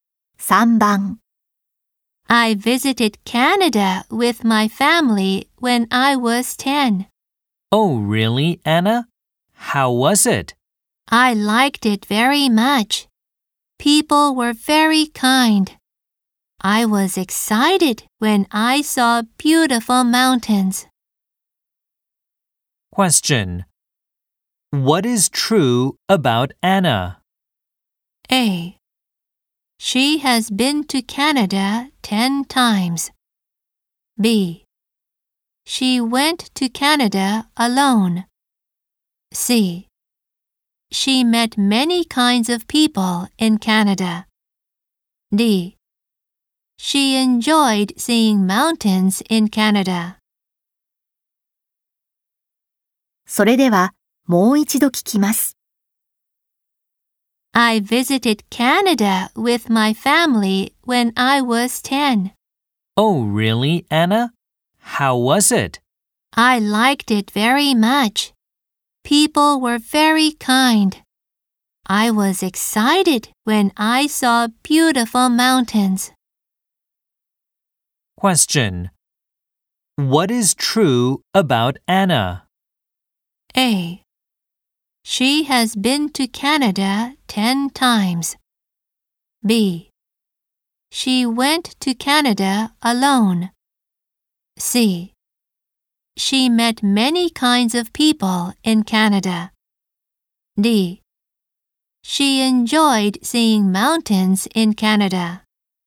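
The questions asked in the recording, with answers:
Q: What is true about Anna?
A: D: She enjoyed seeing mountains in Canada.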